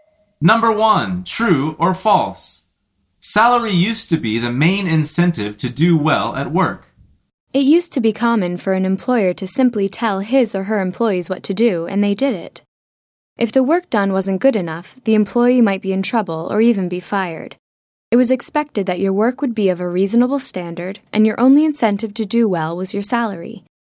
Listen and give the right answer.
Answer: The answer is true.